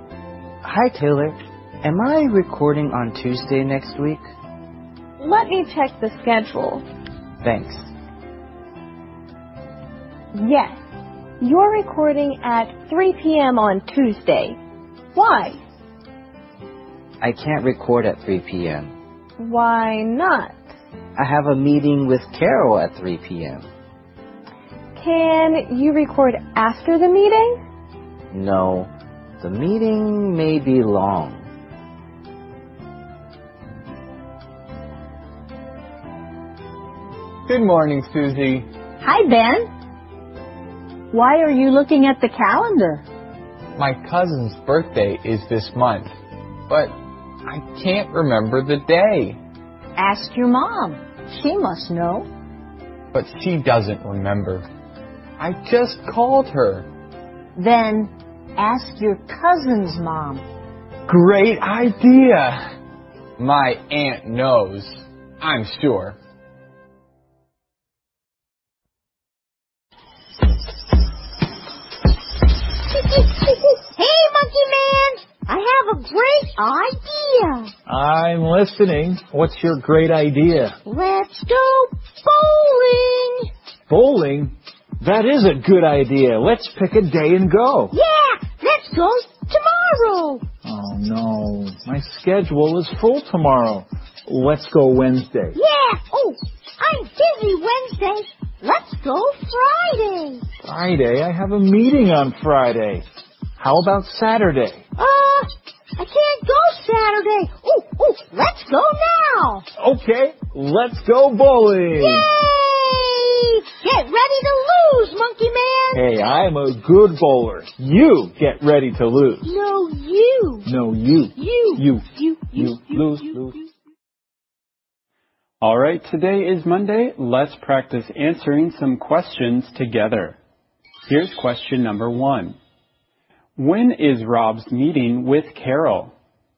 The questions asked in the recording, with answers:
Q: When is Rob's meeting with Carol?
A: Rob's meeting with Carol is on Tuesday at 3 p.m.